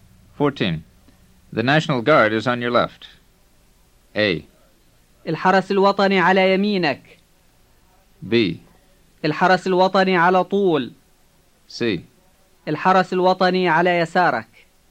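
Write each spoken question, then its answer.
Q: The National Guard is on your left.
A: C: الحرس الوطني على يسارك.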